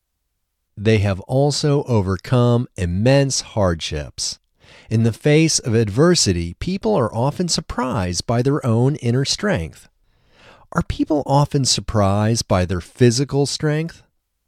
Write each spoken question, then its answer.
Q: Are people often surprised by their physical strength?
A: No, people aren't often surprised by their physical strength.